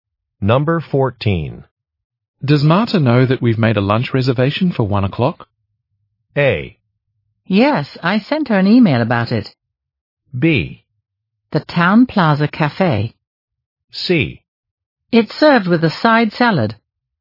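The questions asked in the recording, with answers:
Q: Does Marta know that we've made a lunch reservation for 1 o'clock?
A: A: Yes, I sent her an email about it.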